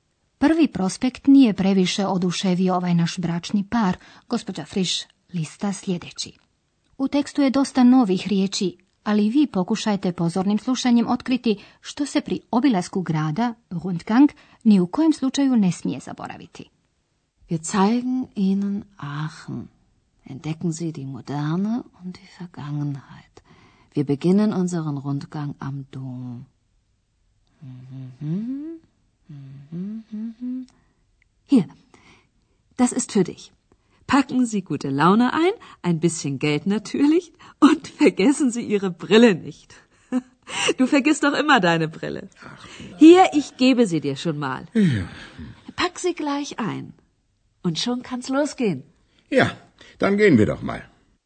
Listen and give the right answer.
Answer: Pomalo šaljivo se posjetitelje podsjeća da ne smiju zaboraviti svoje naočale.